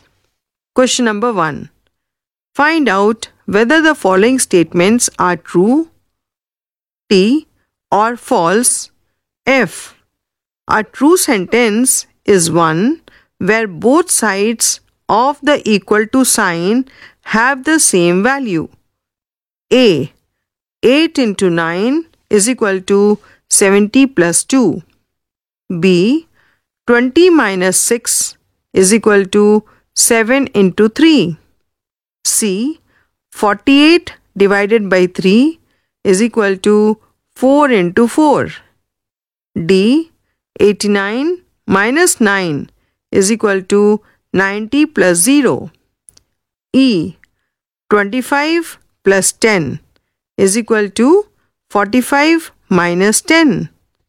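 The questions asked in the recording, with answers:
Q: A. 8 into 9 is equal to 70 plus 2.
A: True

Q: B. 20 minus 6 is equal to 7 into 3.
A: False

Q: C. 48 divided by 3 is equal to 4 into 4.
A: True

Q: D. 89 minus 9 is equal to 90 plus 0.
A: False

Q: E. 25 plus 10 is equal to 45 minus 10.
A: True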